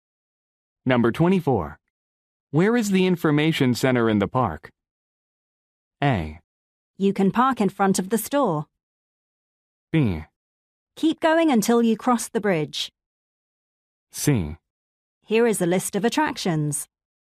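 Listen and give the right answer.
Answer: B: Keep going until you cross the bridge.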